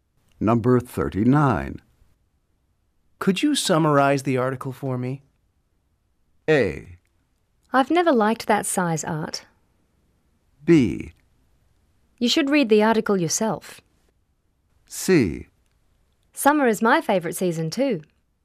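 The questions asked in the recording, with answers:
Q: Could you summarize the article for me?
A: B: You should read the article yourself.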